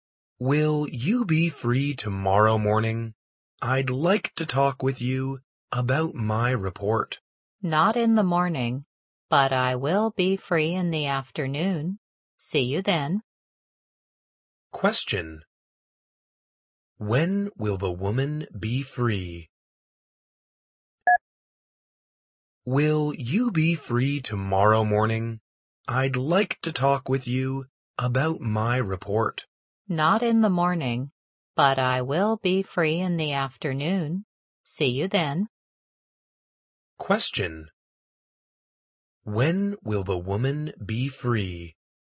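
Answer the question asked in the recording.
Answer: Tomorrow afternoon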